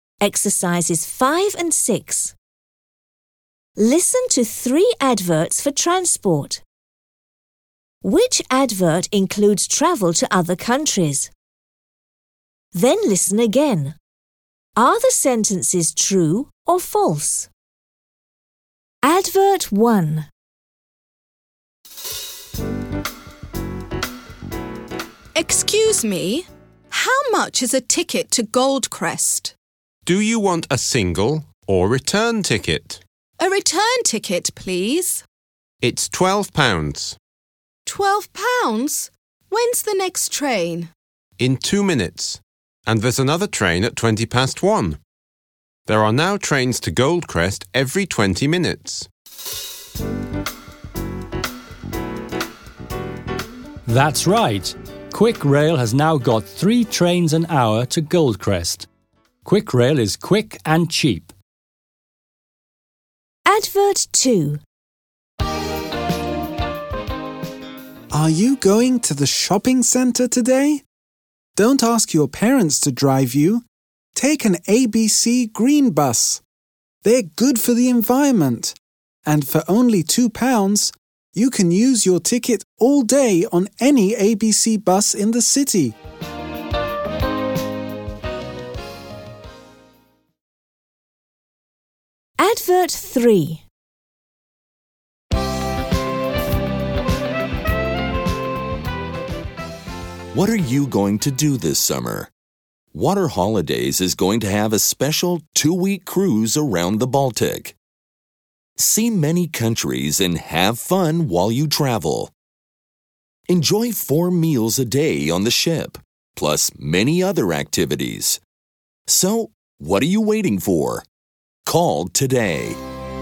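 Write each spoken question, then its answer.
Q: Which advert includes travel to other countries?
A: Advert 3 (the Water Holidays Baltic cruise)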